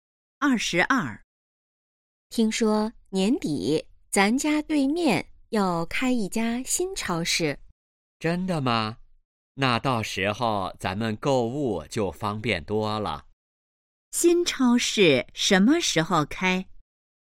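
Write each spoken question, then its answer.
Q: 新超市什么时候开?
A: 年底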